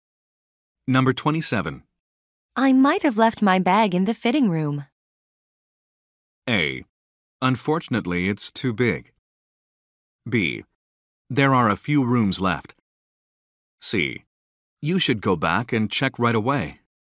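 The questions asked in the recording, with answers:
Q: I might have left my bag in the fitting room.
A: C: You should go back and check right away.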